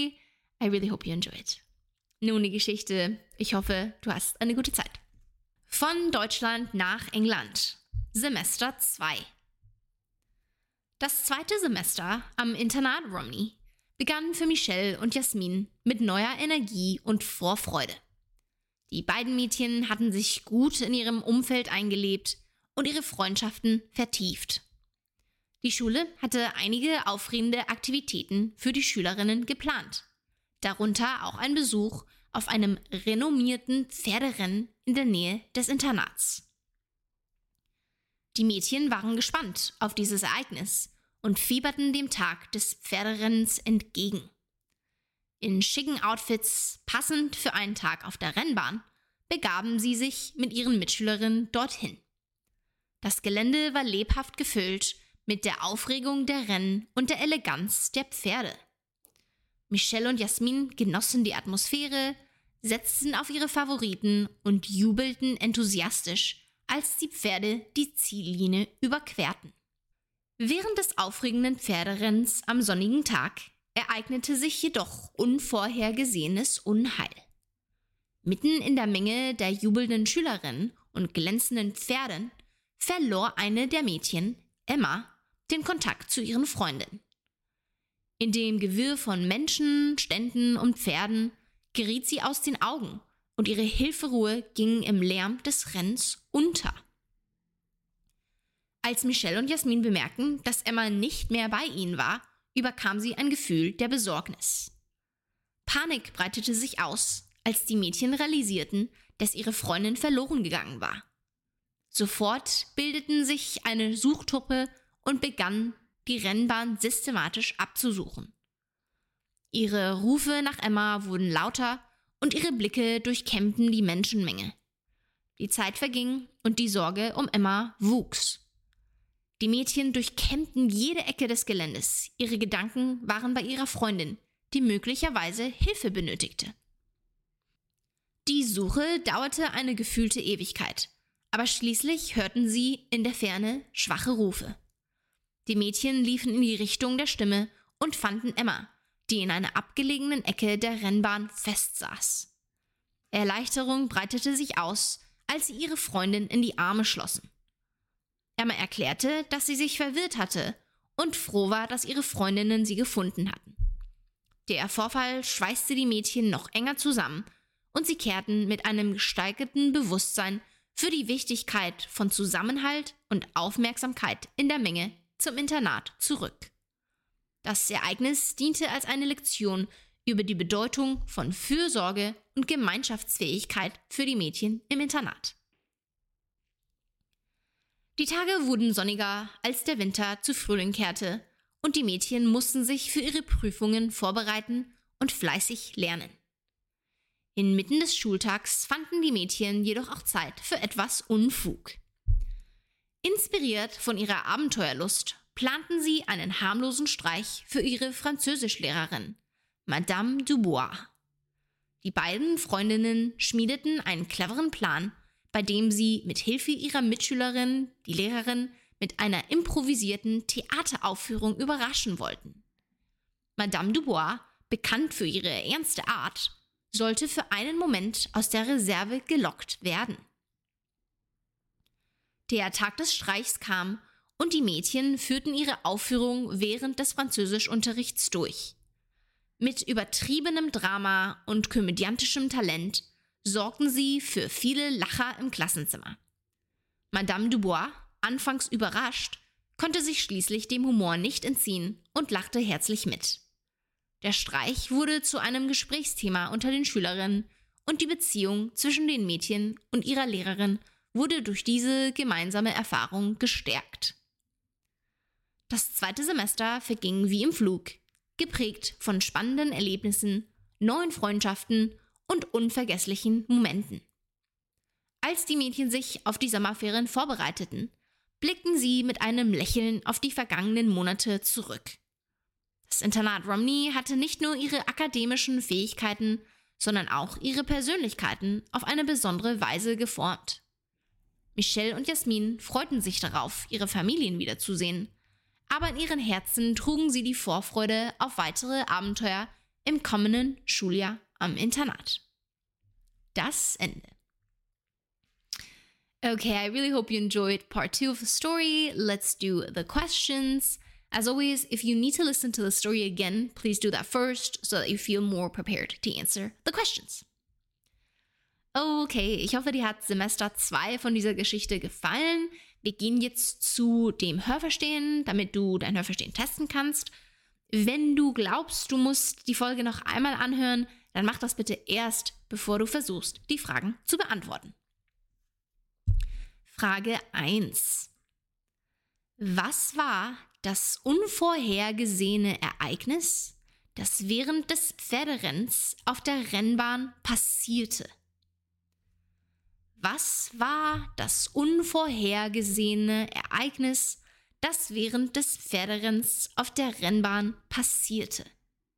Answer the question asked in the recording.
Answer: Mitten in der Menge der jubelnden Schülerinnen verlor eine der Mädchen, Emma, den Kontakt zu ihren Freundinnen.